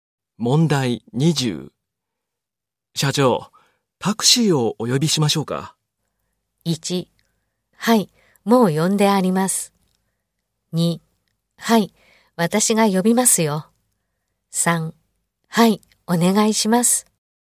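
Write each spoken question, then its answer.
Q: 社長、タクシーをお呼びしましょうか。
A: 1: はい、お願いします。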